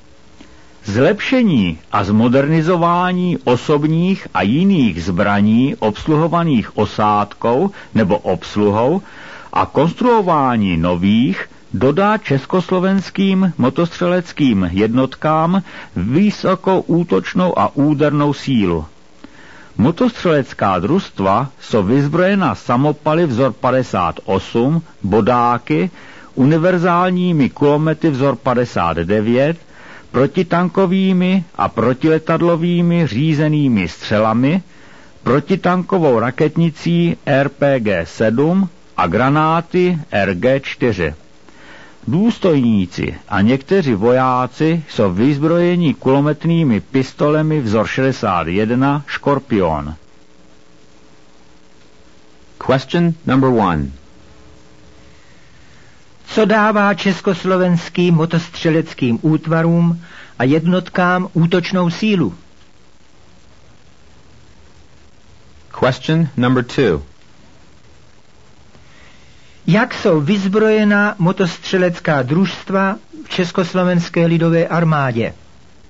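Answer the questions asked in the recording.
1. Zlepšení a zmodernizování osobních a jiných zbraní a konstruování nových zbraní
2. Samopaly vzor 58, bodáky, univerzálními kulomety vzor 59, protitankovými a protiletadlovými řízenými střelami, raketnicí RPG-7 a granáty RG-4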